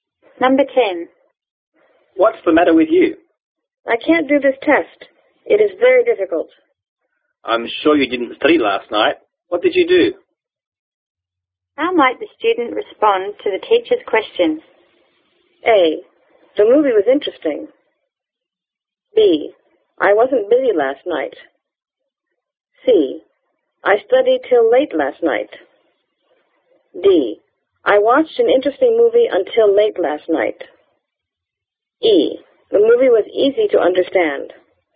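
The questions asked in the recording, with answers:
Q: How might the student respond to the teacher's question?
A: D: I watched an interesting movie until late last night.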